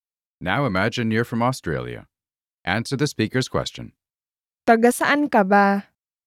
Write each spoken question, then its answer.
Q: Taga saan ka ba?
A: Taga Australia ako.